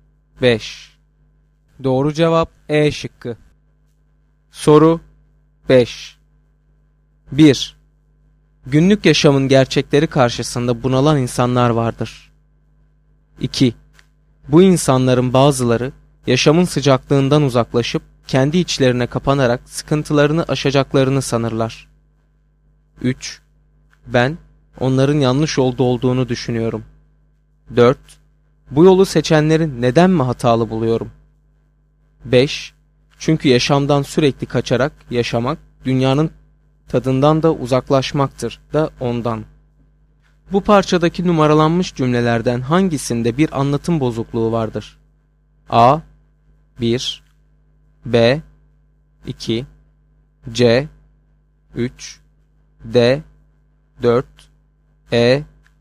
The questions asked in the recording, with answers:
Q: Bu parçadaki numaralanmış cümlelerden hangisinde bir anlatım bozukluğu vardır?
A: Doğru cevap E şıkkı.